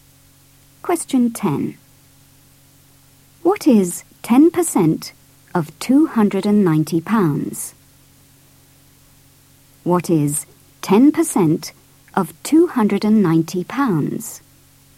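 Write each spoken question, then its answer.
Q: What is 10% of 290 pounds?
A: £29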